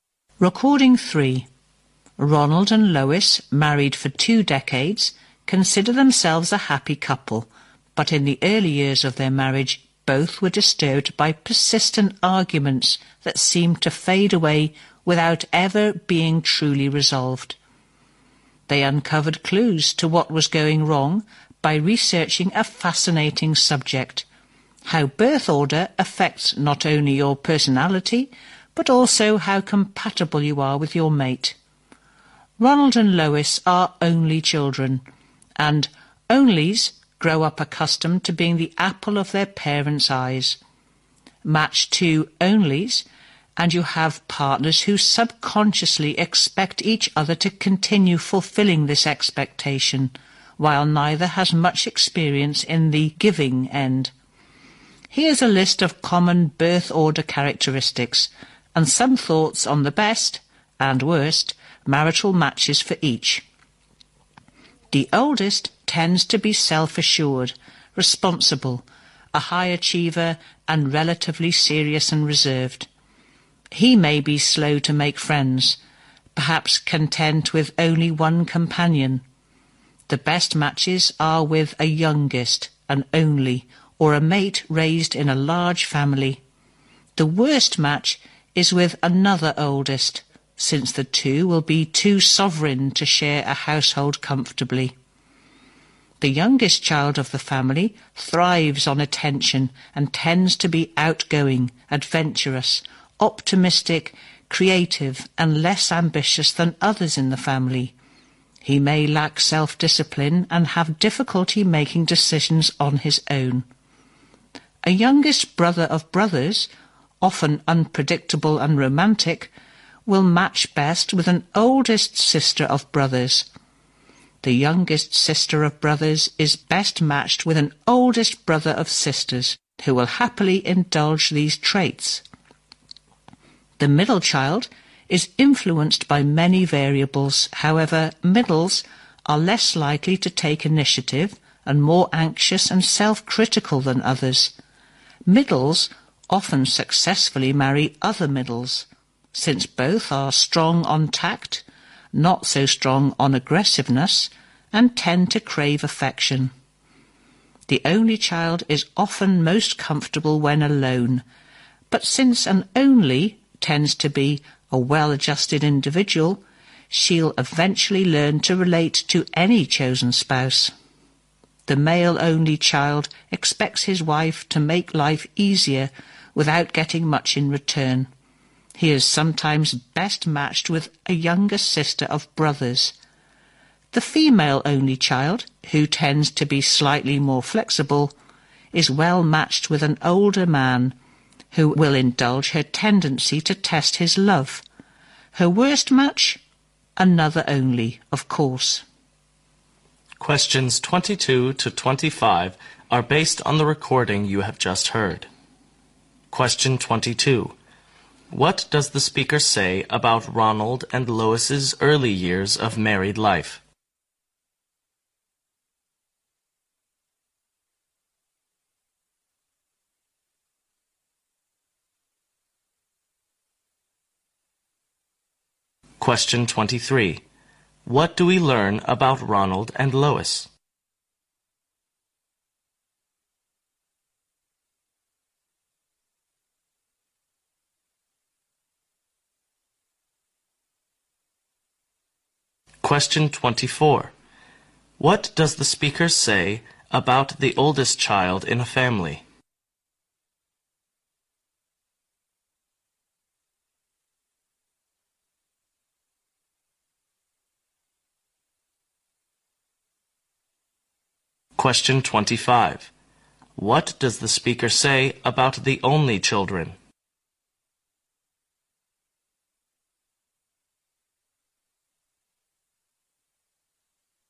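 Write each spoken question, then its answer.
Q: What does the speaker say about Ronald and Lois's early years of married life?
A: They were troubled by persistent arguments that were never truly resolved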